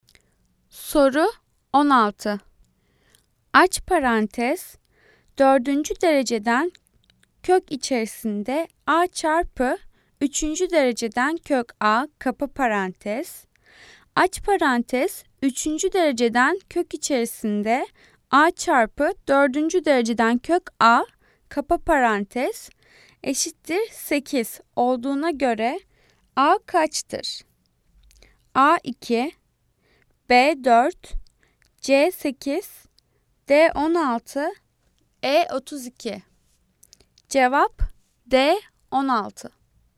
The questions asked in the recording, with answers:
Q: Aç parantez 4. dereceden kök içerisinde a çarpı 3. dereceden kök a kapa parantez. Aç parantez 3. dereceden kök içerisinde a çarpı 4. dereceden kök a kapa parantez eşittir 8 olduğuna göre a kaçtır?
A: Cevap D 16.